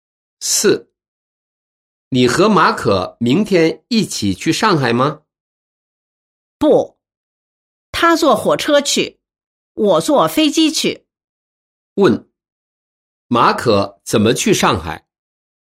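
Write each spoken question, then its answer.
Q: 问,马可怎么去上海?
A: 坐火车去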